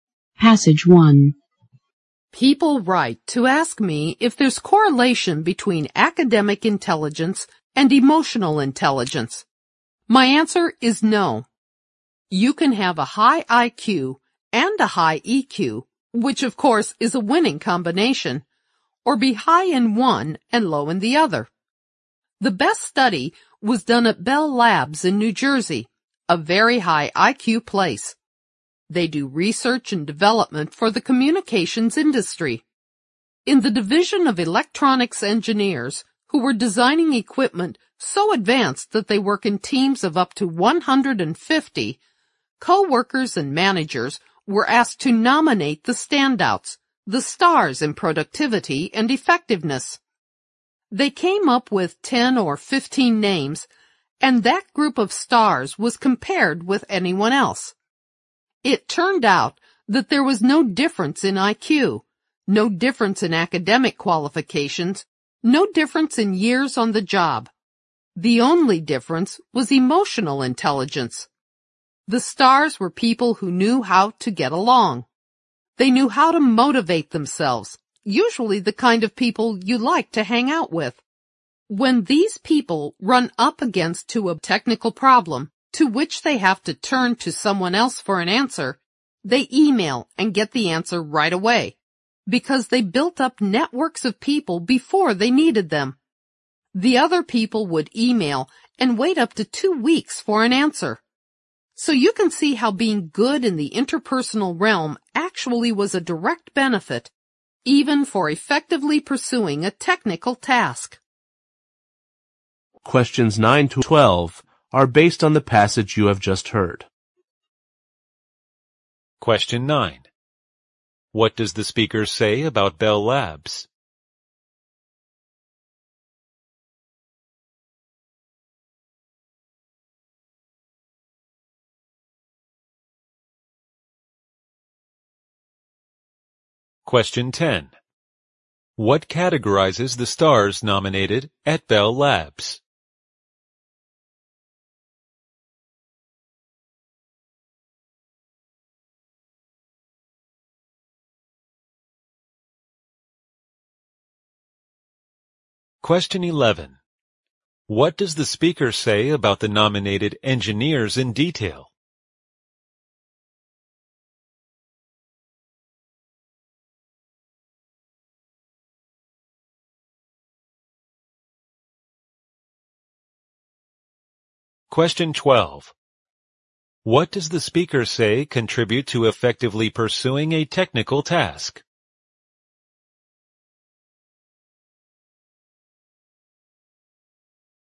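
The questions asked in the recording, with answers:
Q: What does the speaker say contribute to effectively pursuing a technical task?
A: Being good in the interpersonal realm, such as building networks of people.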